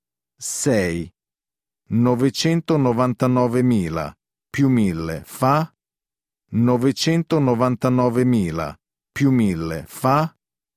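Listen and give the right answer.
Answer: 1.000.000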